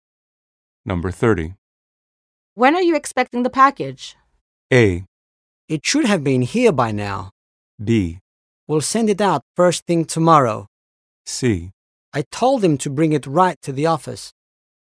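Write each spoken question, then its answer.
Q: When are you expecting the package?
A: A: It should have been here by now.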